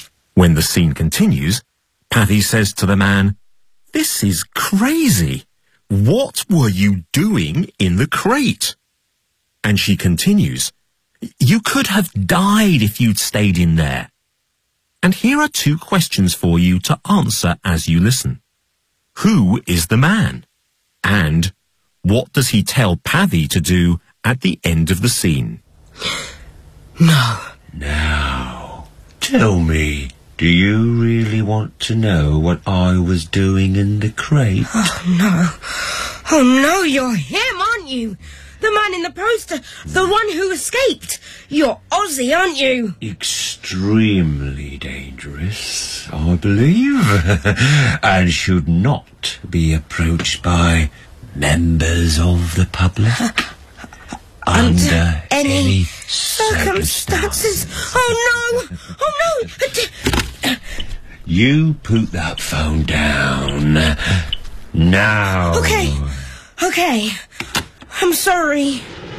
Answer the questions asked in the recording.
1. Yes, the man is Ozzy Skinner, the escaped convict.
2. He says, "You put that phone down now."